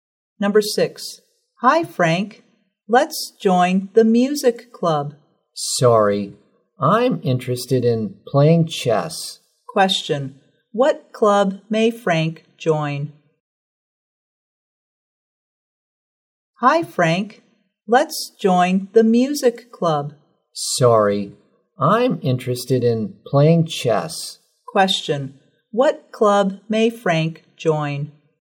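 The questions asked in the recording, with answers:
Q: What club may Frank join?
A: The chess club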